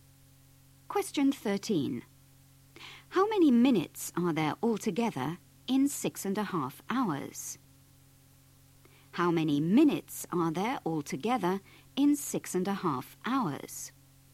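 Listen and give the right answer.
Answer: 390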